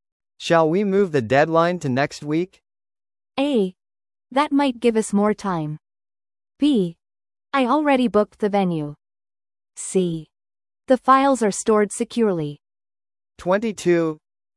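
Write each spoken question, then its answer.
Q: Shall we move the deadline to next week?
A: A: That might give us more time.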